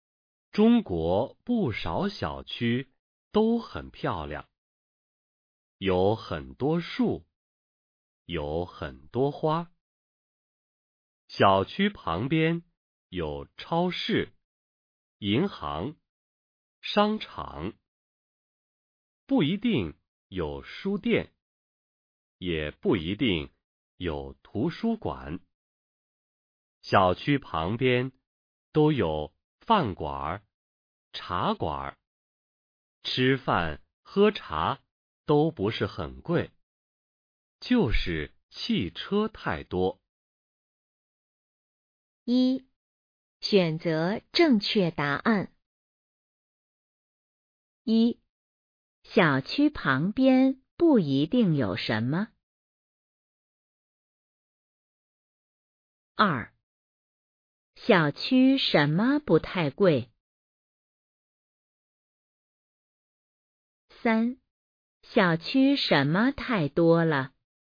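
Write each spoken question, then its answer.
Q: 一,小区旁边不一定有什 么。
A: 书店和图书馆

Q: 二,小区什么不太贵?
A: 吃饭喝茶

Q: 三,小区什么太多了?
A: 汽车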